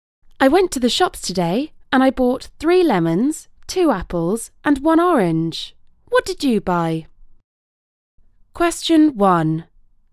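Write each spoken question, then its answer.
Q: What did you buy?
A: 3 lemons, 2 apples and 1 orange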